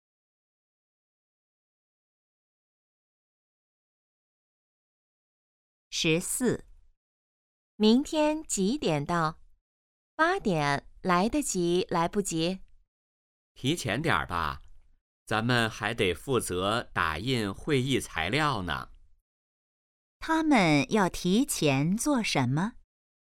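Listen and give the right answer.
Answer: 打印会议材料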